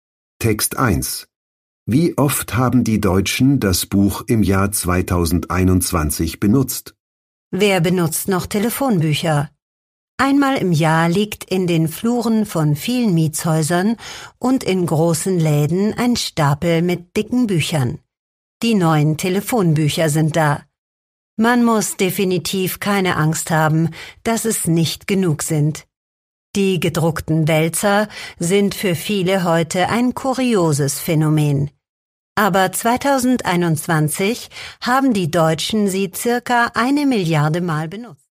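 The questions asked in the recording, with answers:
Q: Wie oft haben die Deutschen das Buch im Jahr 2021 benutzt?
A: circa 1 Milliarde Mal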